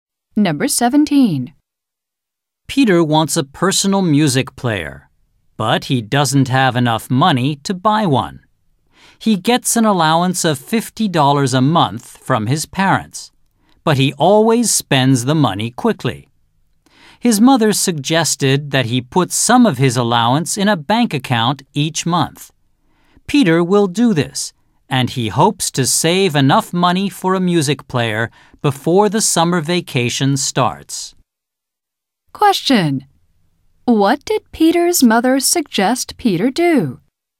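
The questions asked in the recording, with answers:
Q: What did Peter's mother suggest Peter do?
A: Put some of his allowance in a bank account each month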